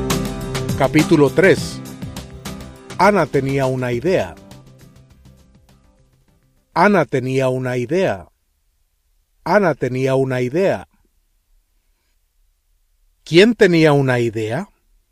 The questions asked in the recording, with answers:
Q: ¿Quién tenía una idea?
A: Ana.